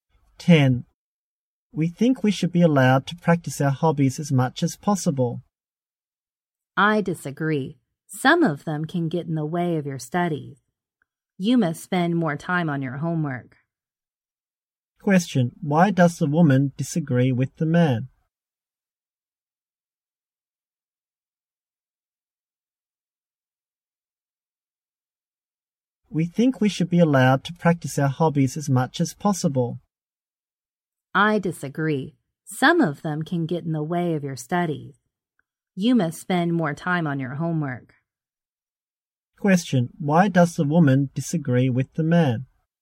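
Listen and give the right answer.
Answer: Some hobbies can get in the way of their studies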